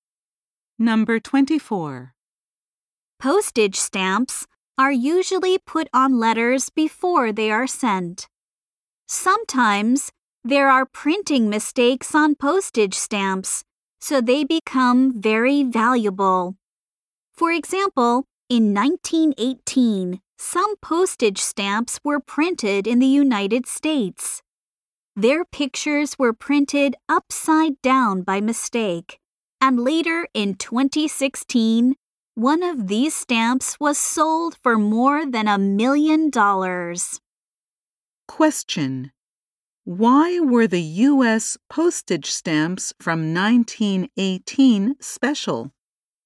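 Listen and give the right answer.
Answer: Their pictures were printed upside down by mistake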